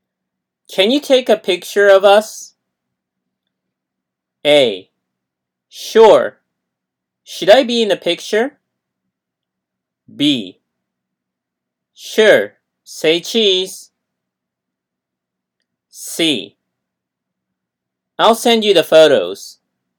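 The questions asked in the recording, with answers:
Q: Can you take a picture of us?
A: B: Sure. Say cheese.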